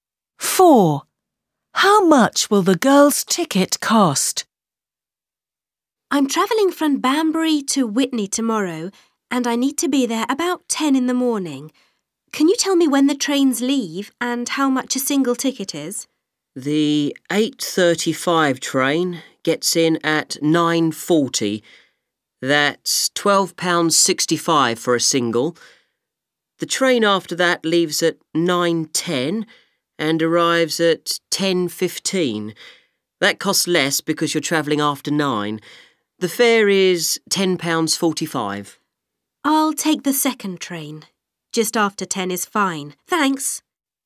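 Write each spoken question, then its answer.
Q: Four. How much will the girl's ticket cost?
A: £10.45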